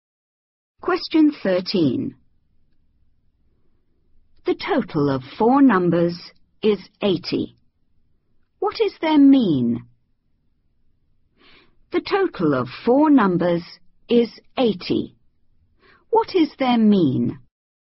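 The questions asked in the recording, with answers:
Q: What is their mean?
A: 20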